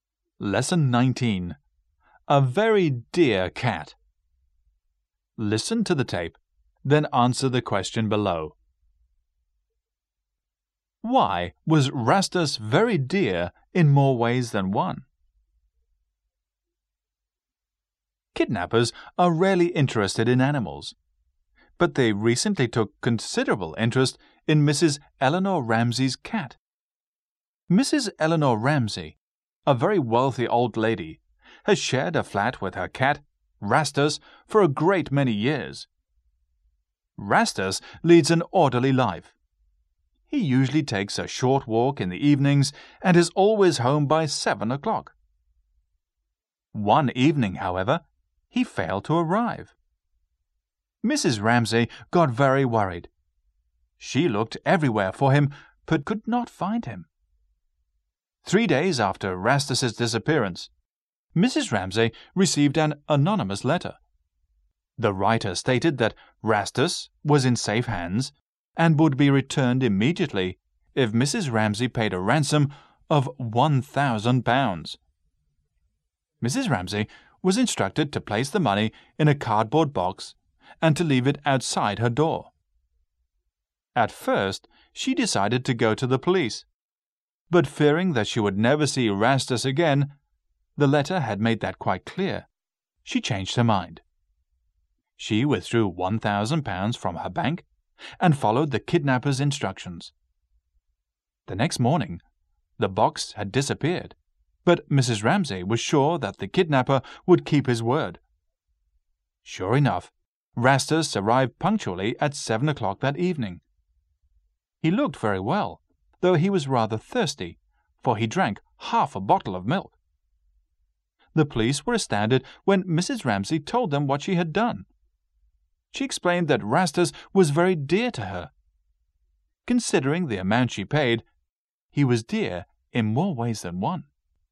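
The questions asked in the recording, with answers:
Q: Why was Rastus very dear in more ways than one?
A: Mrs. Ramsey loved him very much, and she paid a ransom of £1,000 to get him back.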